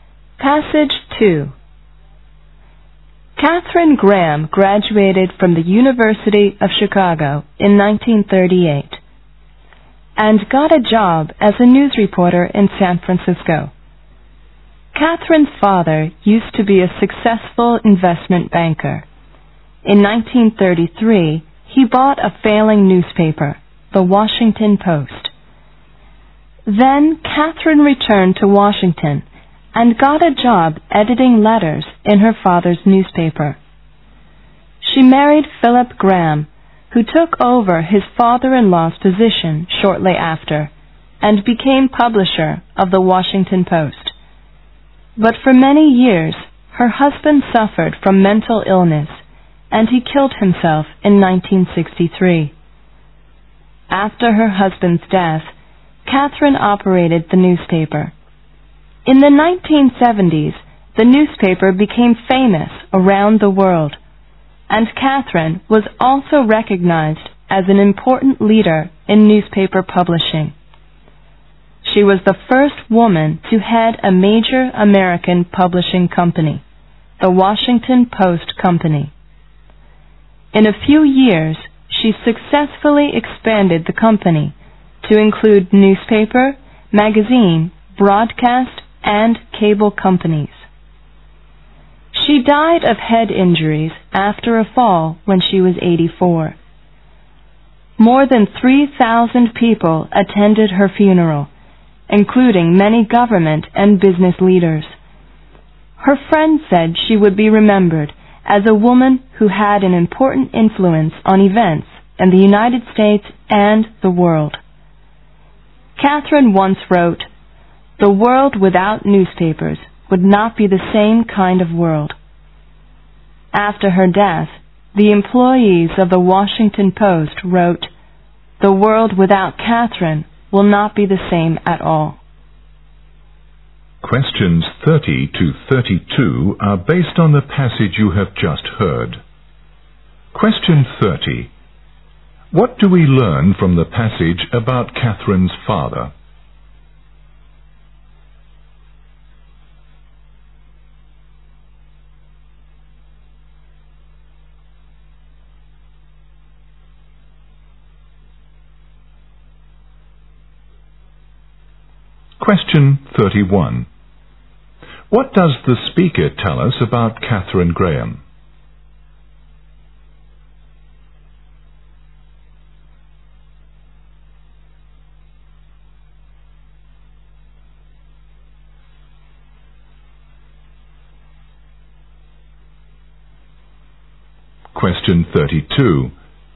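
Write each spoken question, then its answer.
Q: What do we learn from the passage about Catherine's father?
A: He was a successful investment banker who bought the failing Washington Post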